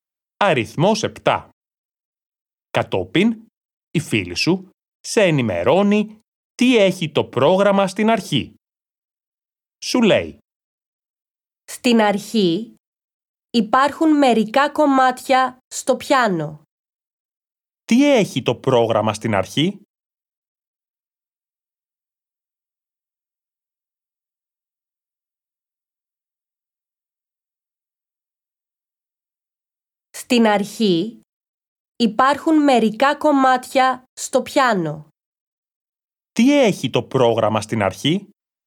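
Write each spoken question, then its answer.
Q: Τι έχει το πρόγραμμα στην αρχή?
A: Μερικά κομμάτια στο πιάνο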